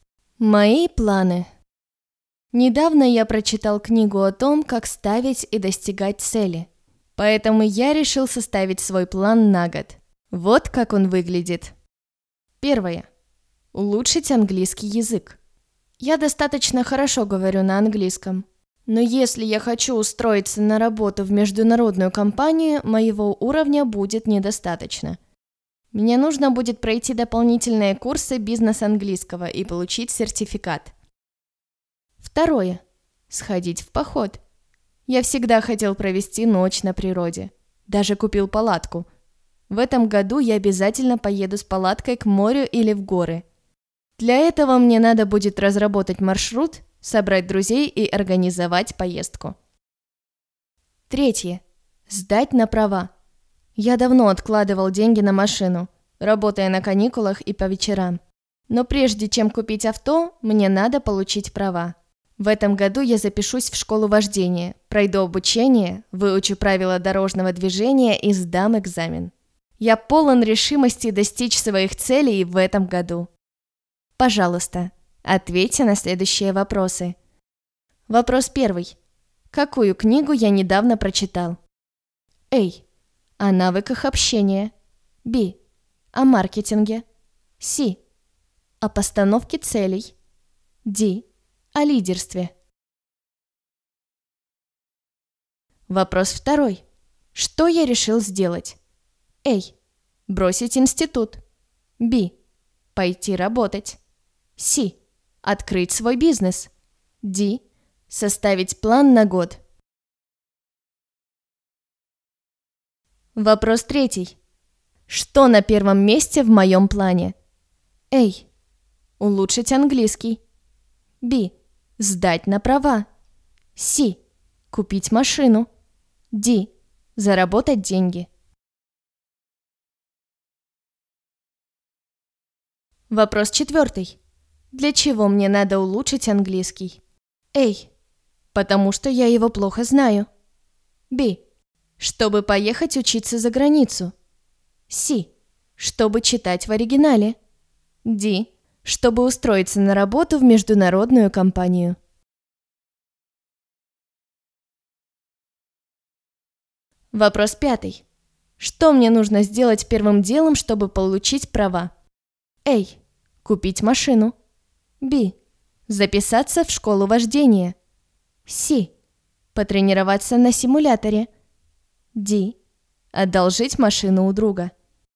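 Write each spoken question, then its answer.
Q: Какую книгу я недавно прочитал?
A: C: О постановке целей

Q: Что я решил сделать?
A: D: Составить план на год

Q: Что на первом месте в моем плане?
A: A: Улучшить английский

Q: Для чего мне надо улучшить английский?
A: D: Чтобы устроиться на работу в международную компанию

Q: Что мне нужно сделать первым делом, чтобы получить права?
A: B: Записаться в школу вождения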